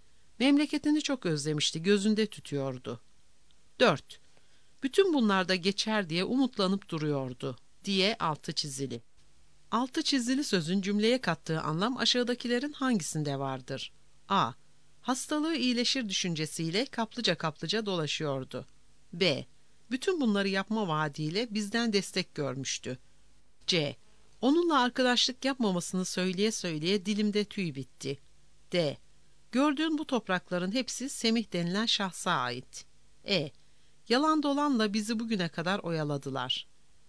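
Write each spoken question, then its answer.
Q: Altı çizili sözün cümleye kattığı anlam aşağıdakilerin hangisinde vardır?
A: A: Hastalığı iyileşir düşüncesiyle kaplıca kaplıca dolaşıyordu.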